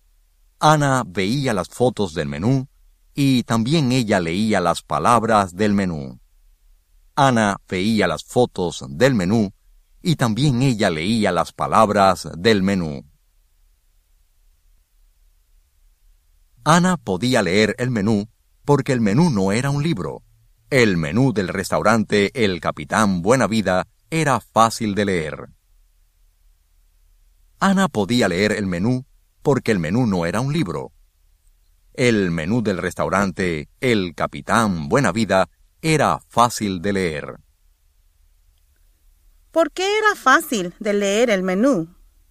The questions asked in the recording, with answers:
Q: ¿Por qué era fácil de leer el menú?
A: Era fácil de leer el menú porque el menú no era un libro.